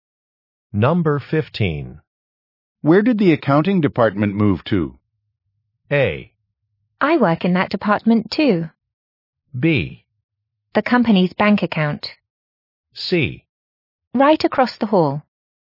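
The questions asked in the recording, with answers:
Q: Where did the accounting department move to?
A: C: Right across the hall.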